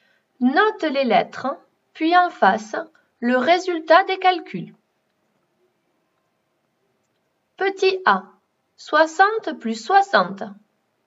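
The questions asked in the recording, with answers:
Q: Petit A, 60 plus 60.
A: 120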